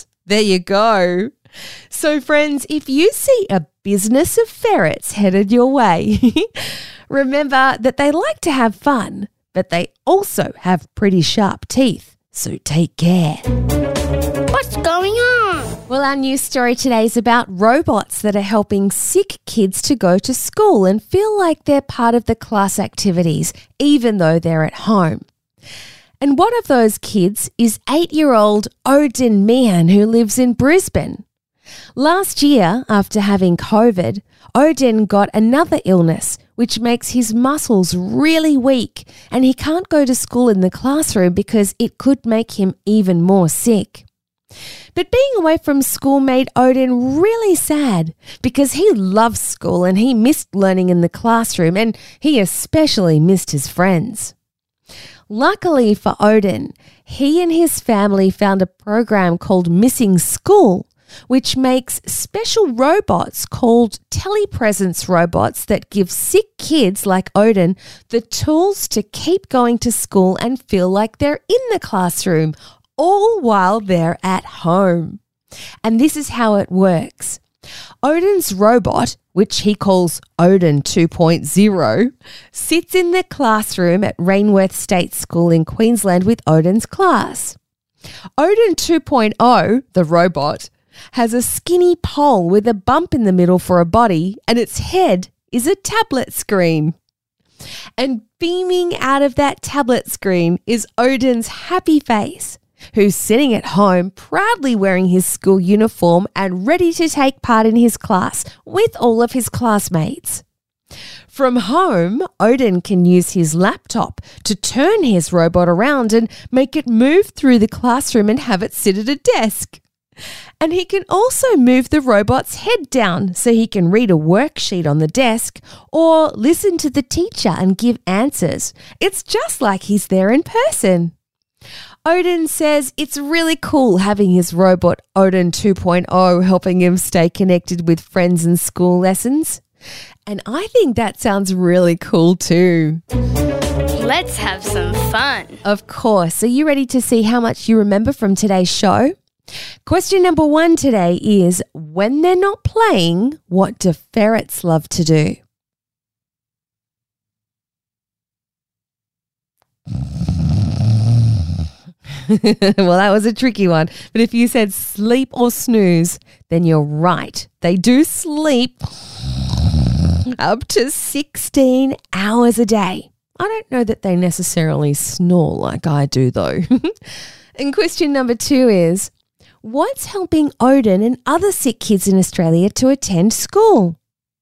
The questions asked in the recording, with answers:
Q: what's helping Odin and other sick kids in Australia to attend school?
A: If you answered a robot or a tablet on a special pole, you got it right.